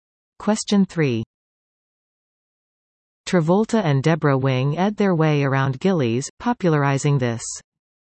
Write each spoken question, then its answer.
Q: Travolta and Deborah Wing ed their way around Gilley's, popularizing this.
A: Answer? Western two-step.